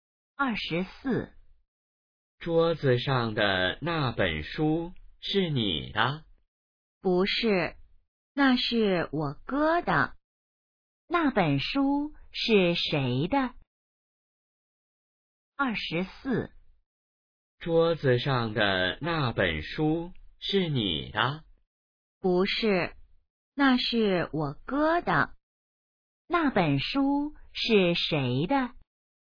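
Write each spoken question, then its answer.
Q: 那本书是谁的?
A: 她哥哥的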